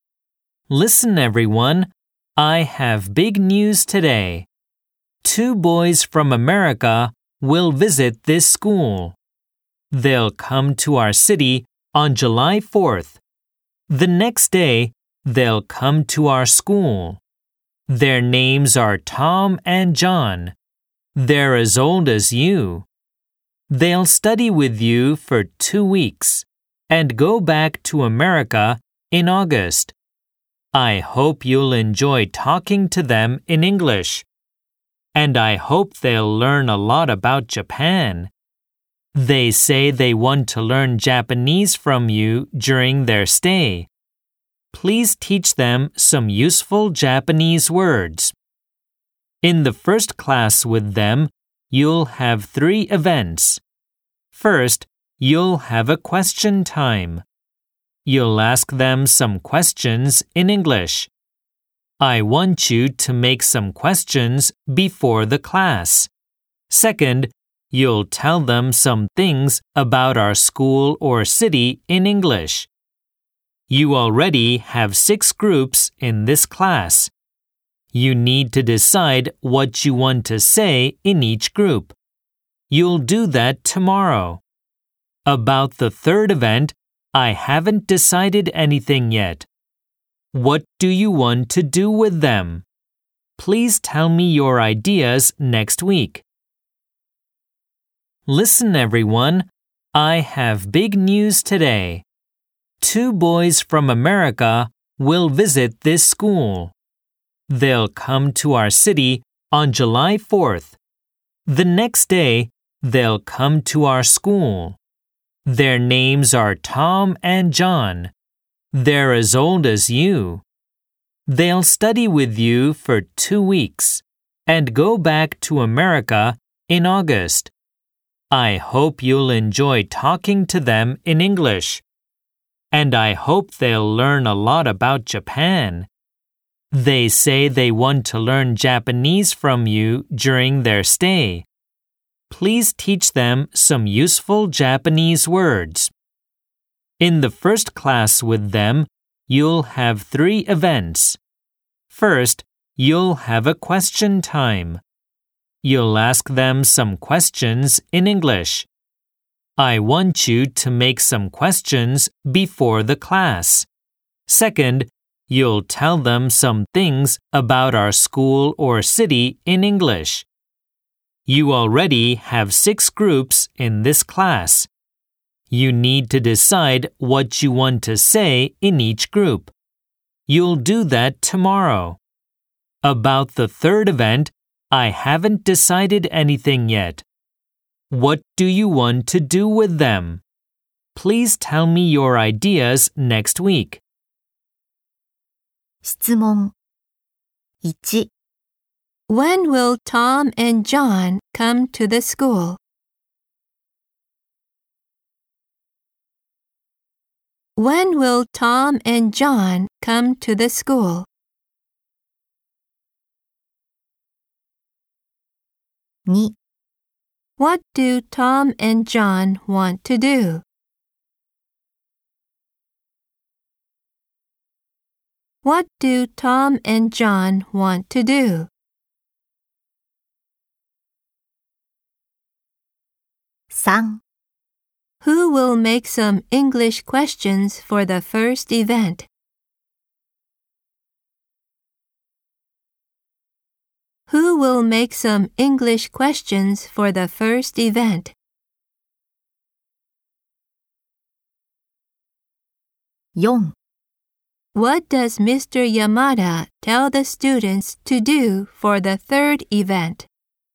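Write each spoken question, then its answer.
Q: When will Tom and John come to the school?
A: On July 5th

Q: What do Tom and John want to do?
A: Learn Japanese from the students

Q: Who will make some English questions for the first event?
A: The students

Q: What does Mr. Yamada tell the students to do for the third event?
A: Tell him their ideas next week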